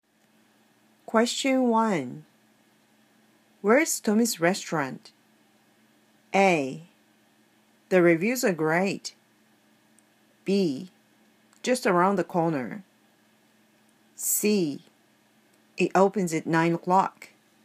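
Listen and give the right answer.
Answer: B: Just around the corner.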